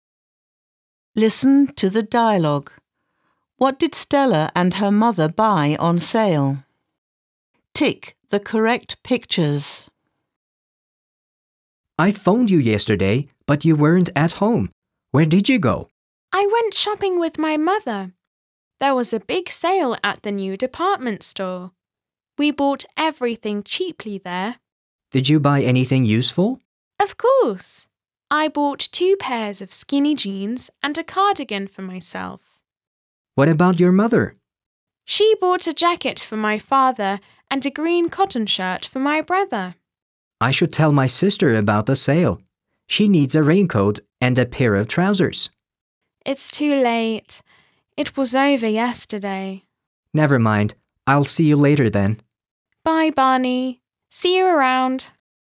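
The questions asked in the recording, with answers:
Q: What did Stella and her mother buy on sale?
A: 2 pairs of skinny jeans, a cardigan, a jacket and a green cotton shirt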